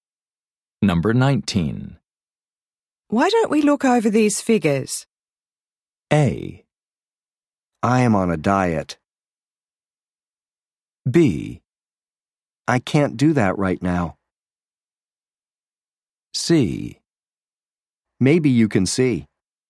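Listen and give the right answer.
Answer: B: I can't do that right now.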